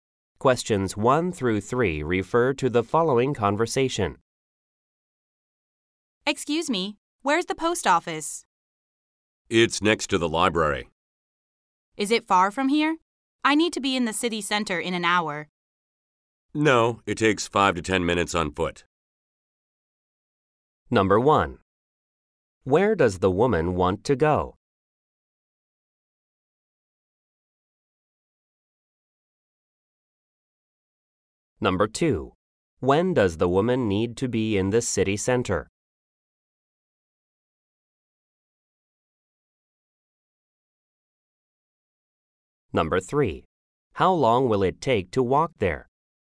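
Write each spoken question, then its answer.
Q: Where does the woman want to go?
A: The post office

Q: When does the woman need to be in the city center?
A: In an hour

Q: How long will it take to walk there?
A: 5 to 10 minutes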